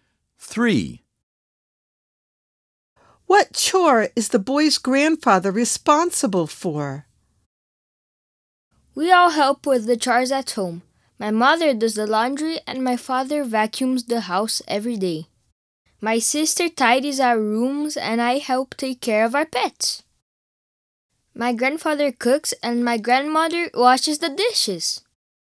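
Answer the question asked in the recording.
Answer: cooking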